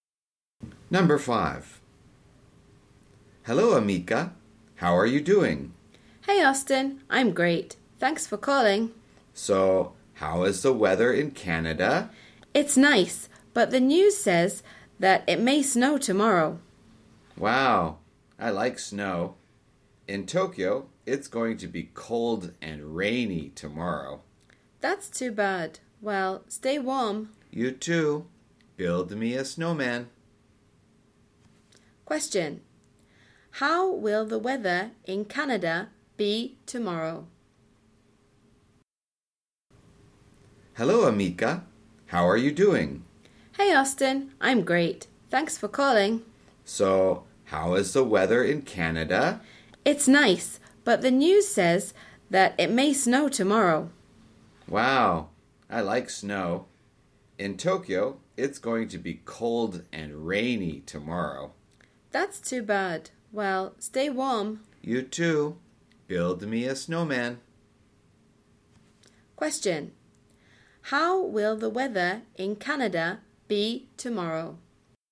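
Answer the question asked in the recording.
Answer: It may snow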